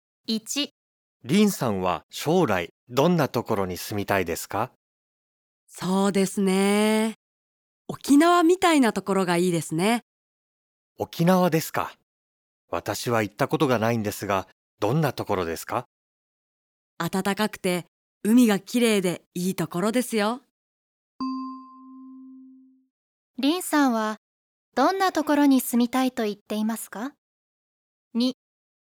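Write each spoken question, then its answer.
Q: 林さんはどんなところに住みたいと言っていますか?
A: 沖縄みたいなところ(暖かくて海がきれいなところ)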